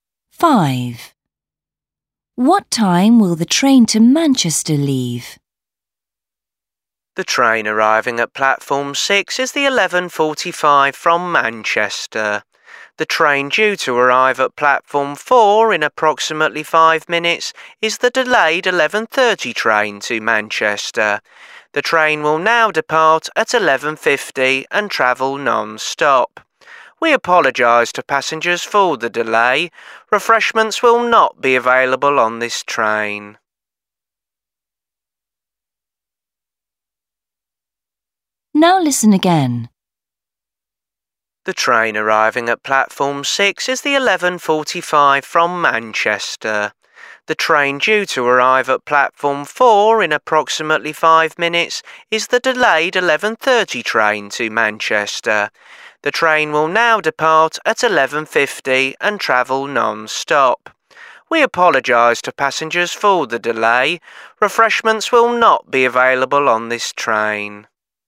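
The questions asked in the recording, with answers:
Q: What time will the train to Manchester leave?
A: 11:50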